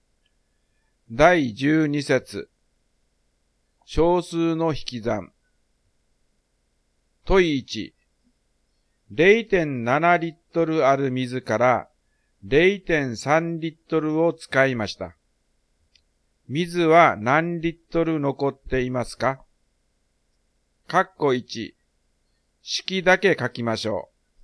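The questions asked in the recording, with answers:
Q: 水は何リットル残っていますか?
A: 0.4リットル(0.7-0.3)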